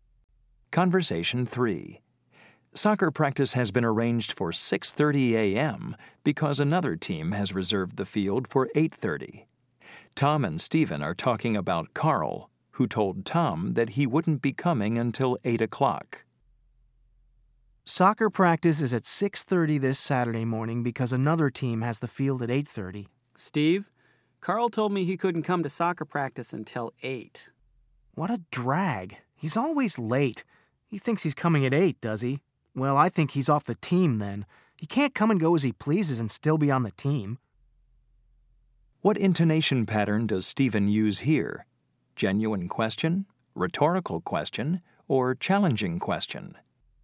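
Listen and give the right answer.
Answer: Challenging question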